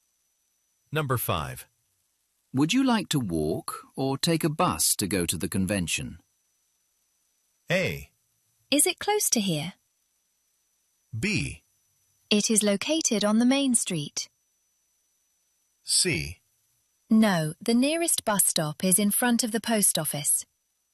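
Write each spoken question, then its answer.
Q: Would you like to walk or take a bus to go to the convention?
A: A: Is it close to here?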